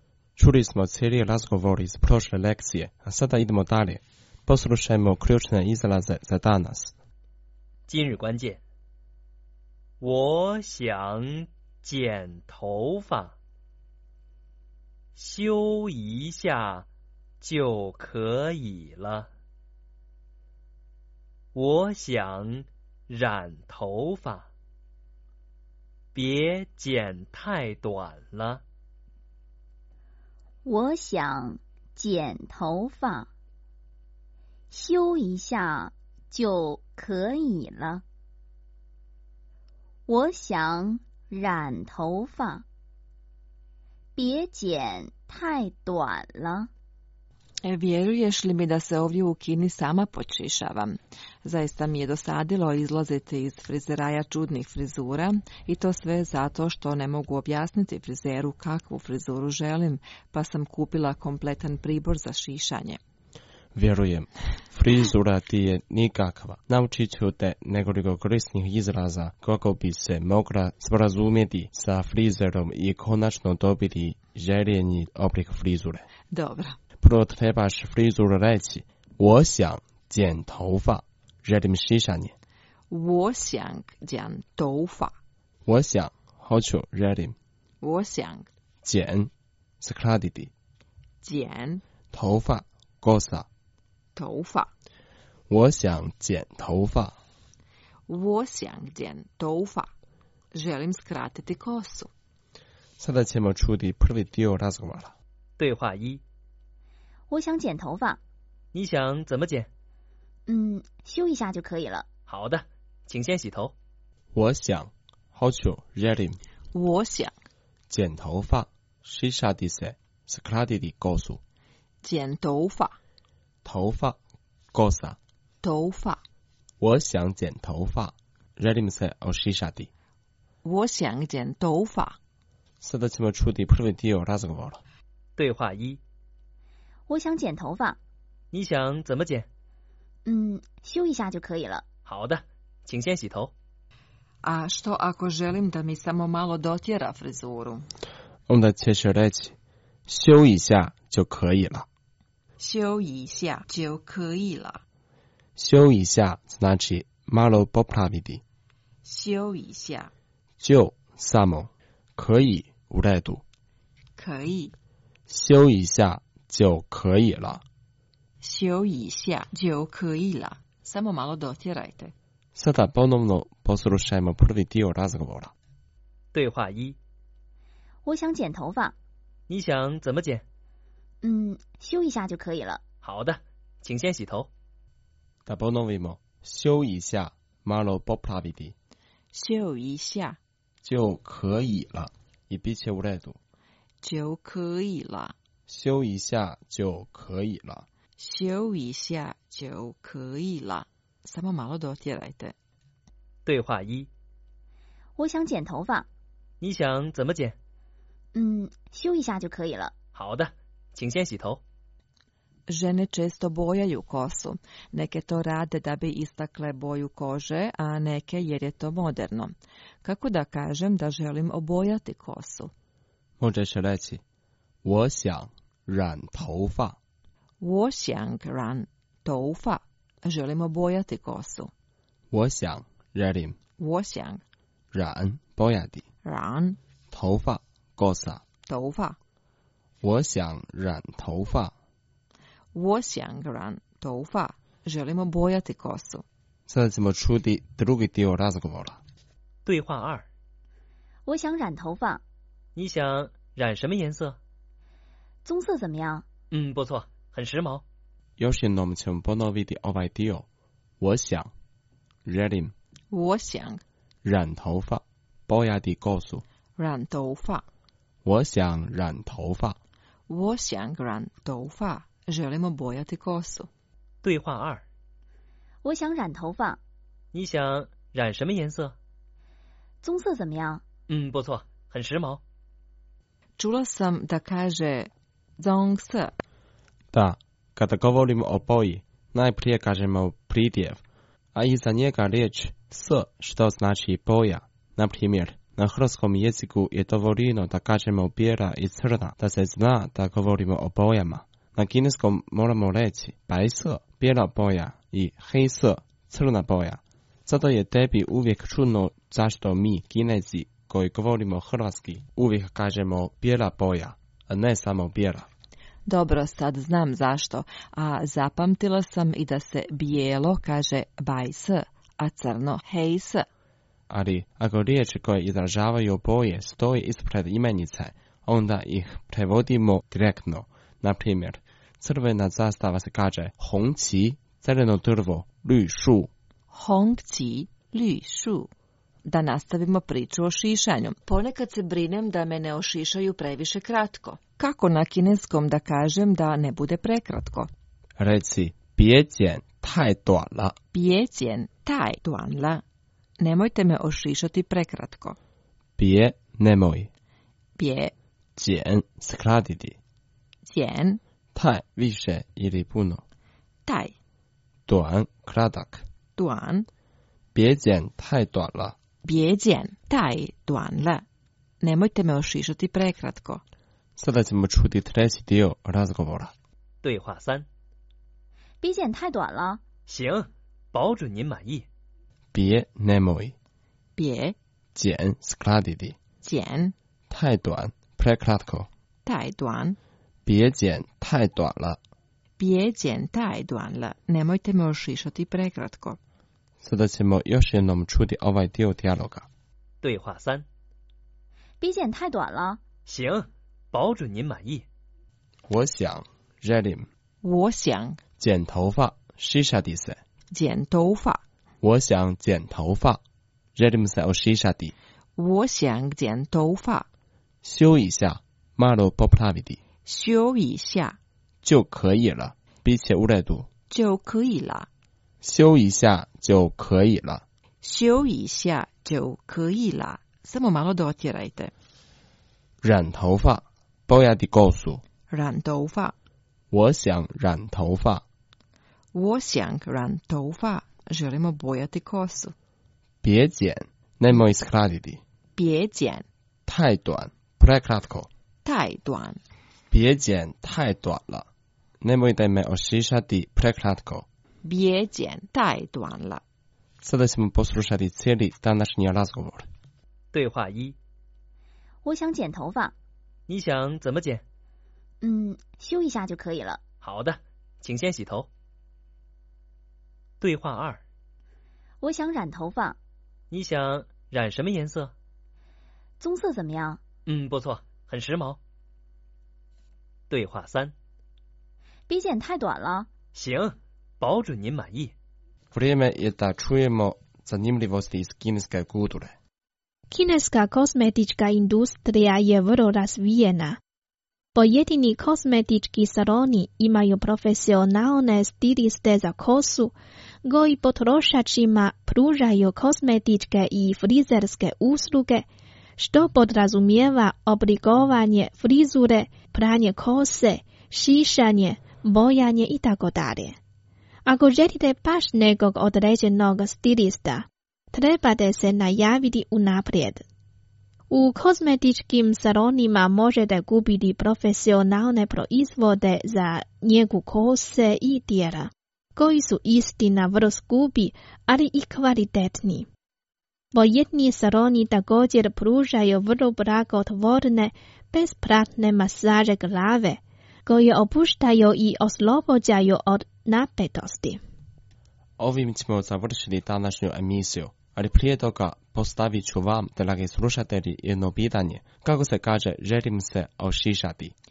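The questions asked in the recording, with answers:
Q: Kako se kaže, želim se ošišati?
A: 我想剪头发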